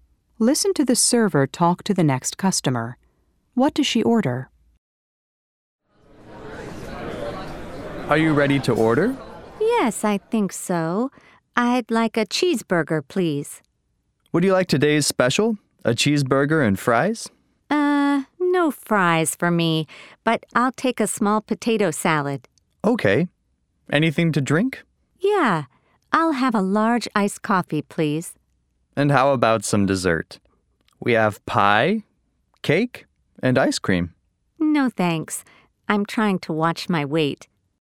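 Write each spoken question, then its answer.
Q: What does she order?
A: A cheeseburger, a small potato salad, and a large iced coffee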